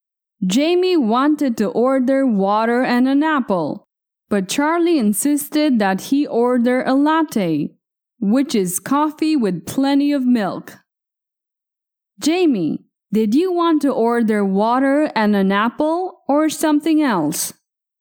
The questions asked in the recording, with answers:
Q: Jamie, did you want to order water and an apple or something else?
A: Water and an apple. I wanted to ask for water and an apple.